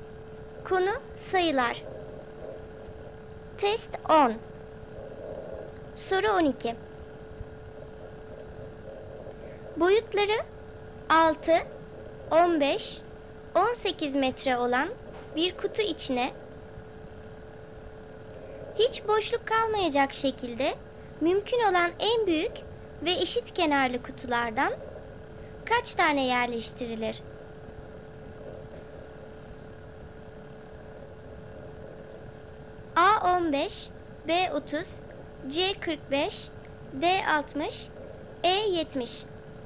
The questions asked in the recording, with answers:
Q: Boyutları 6, 15, 18 metre olan bir kutu içine hiç boşluk kalmayacak şekilde mümkün olan en büyük ve eşit kenarlı kutulardan kaç tane yerleştirilir?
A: Doğru cevap D 60.